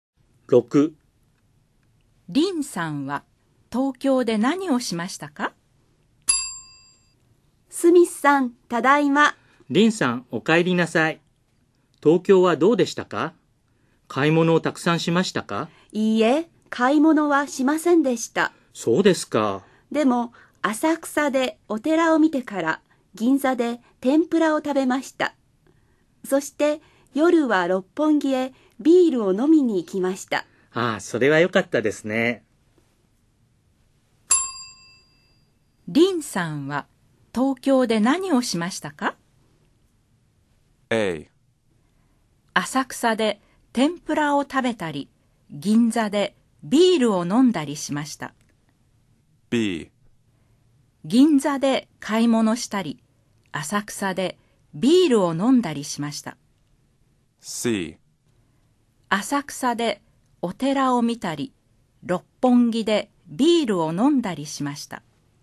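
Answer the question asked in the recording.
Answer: C: 浅草でお寺を見たり、六本木でビールを飲んだりしました。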